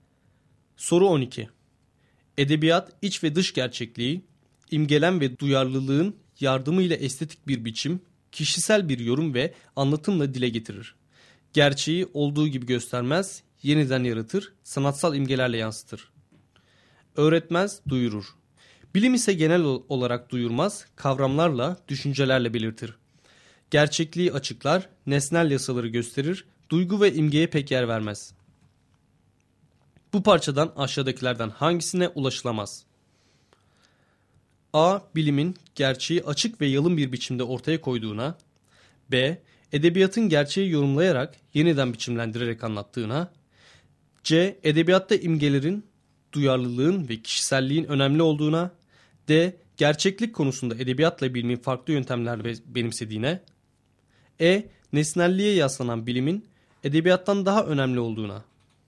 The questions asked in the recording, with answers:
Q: Bu parçadan aşağıdakilerden hangisine ulaşılamaz?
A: Doğru cevap E şıkkı.